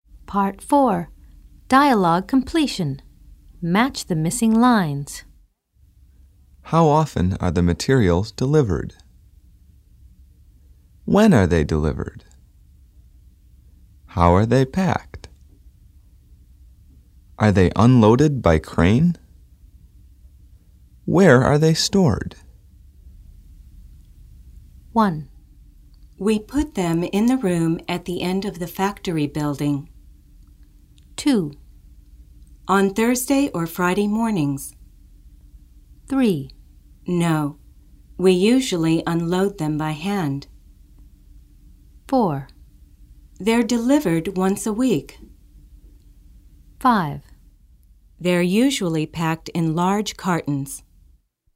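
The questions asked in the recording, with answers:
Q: How often are the materials delivered?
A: 4: They're delivered once a week.

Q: When are they delivered?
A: 2: On Thursday or Friday mornings.

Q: How are they packed?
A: 5: They're usually packed in large cartons.

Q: Are they unloaded by crane?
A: 3: No, we usually unload them by hand.

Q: Where are they stored?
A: 1: We put them in the room at the end of the factory building.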